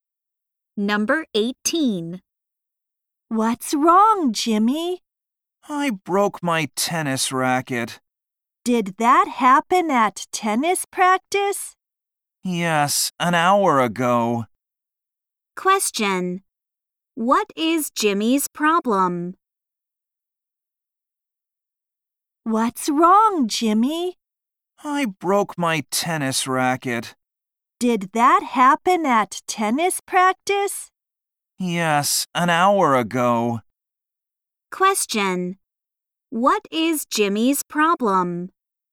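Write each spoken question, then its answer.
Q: What is Jimmy's problem?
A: He broke his tennis racket.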